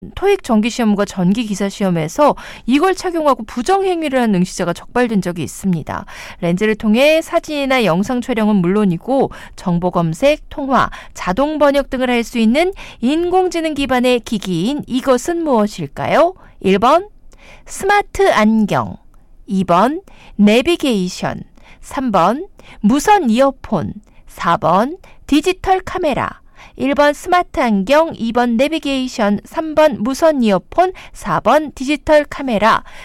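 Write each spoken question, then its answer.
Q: 렌즈를 통해 사진이나 영상 촬영은 물론이고 정보검색, 통화, 자동번역 등을 할 수 있는 인공지능 기반의 기기인 이것은 무엇일까요?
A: 1: 스마트 안경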